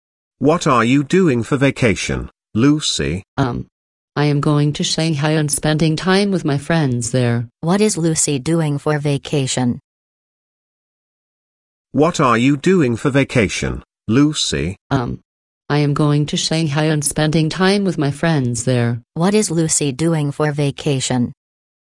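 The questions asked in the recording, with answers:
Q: What is Lucy doing for vacation?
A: Going to Shanghai and spending time with friends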